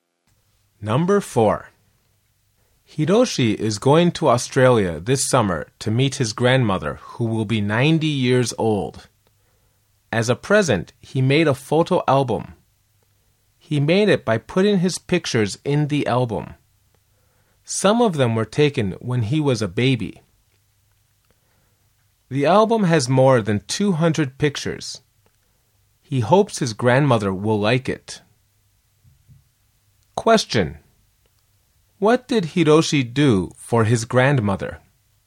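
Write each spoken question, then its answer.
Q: What did Hiroshi do for his grandmother?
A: He made a photo album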